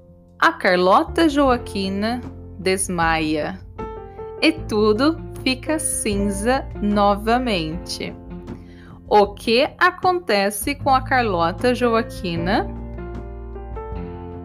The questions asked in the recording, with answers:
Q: O que acontece com a Carlota Joaquina?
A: Ela desmaia. A Carlota Joaquina desmaia e tudo fica cinza novamente.